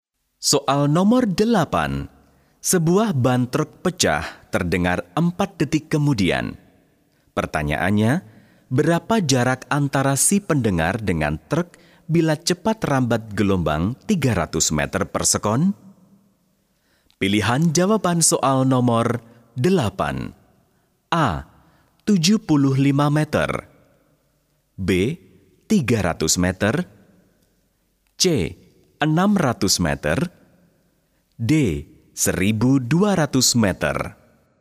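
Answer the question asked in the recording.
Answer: D: 1200 meter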